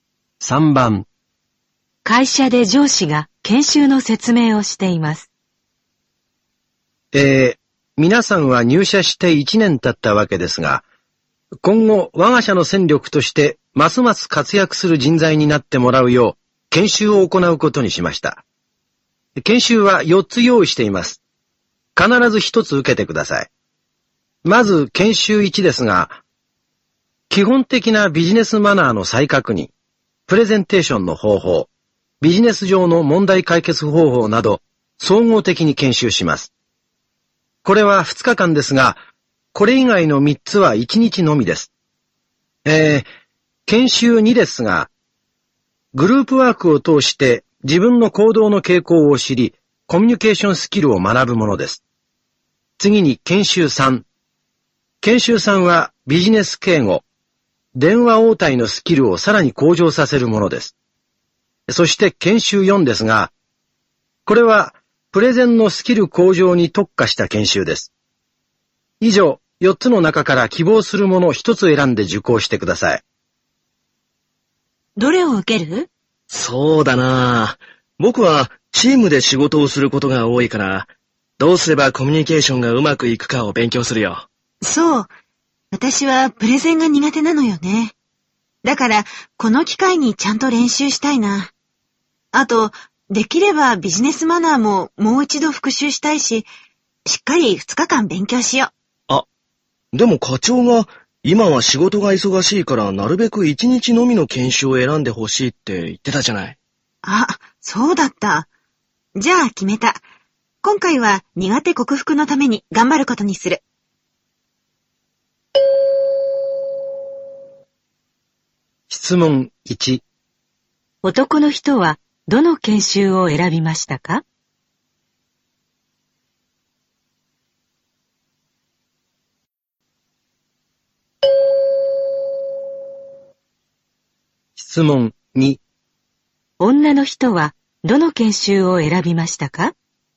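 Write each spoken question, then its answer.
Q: 男の人はどの研修を選びましたか?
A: 研修2

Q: 女の人はどの研修を選びましたか?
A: 研修4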